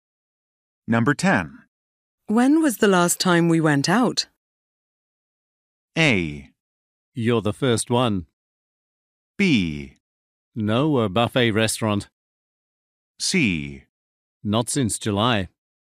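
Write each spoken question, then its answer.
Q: When was the last time we went out?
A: C: Not since July.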